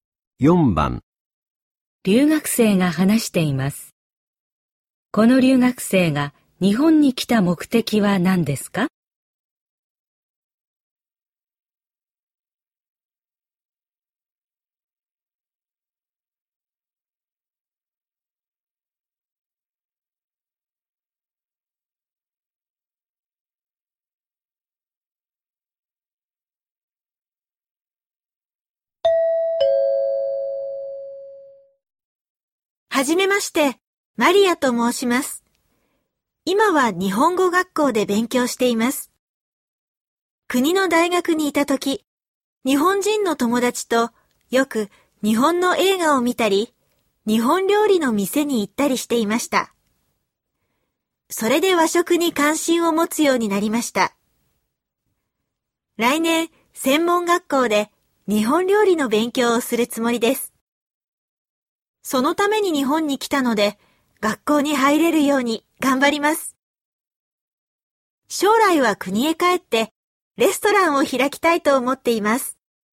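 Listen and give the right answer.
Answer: 専門学校で日本料理を勉強するため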